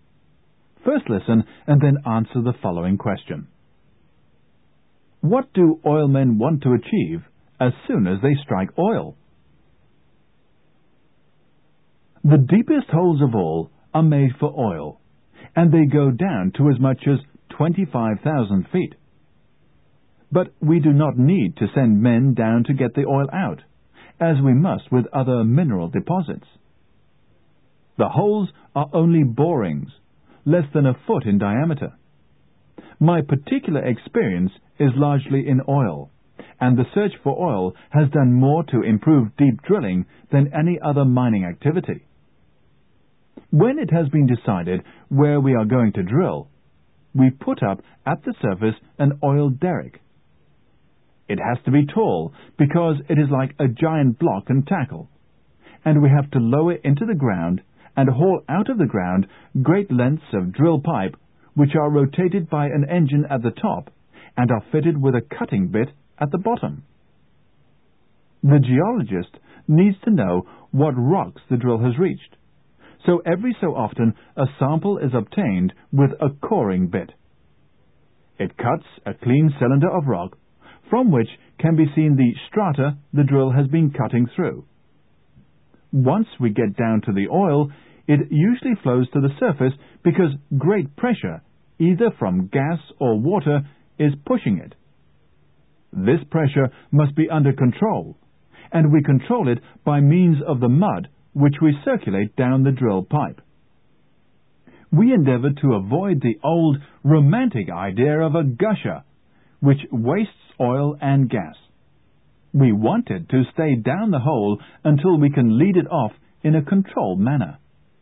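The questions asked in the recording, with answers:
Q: What do oil men want to achieve as soon as they strike oil?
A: To keep the oil under control so it stays down the hole until it can be led off in a controlled way, not gushing out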